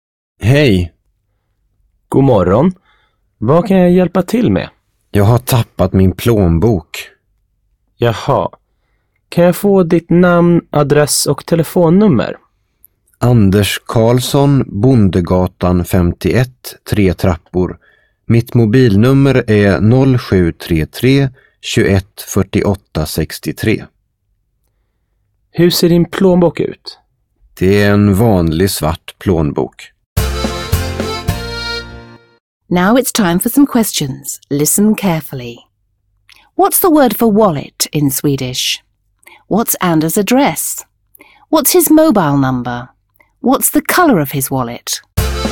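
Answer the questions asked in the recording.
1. plånbok
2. Bondegatan 51, 3 trappor
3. 0733 21 48 63
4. black (svart)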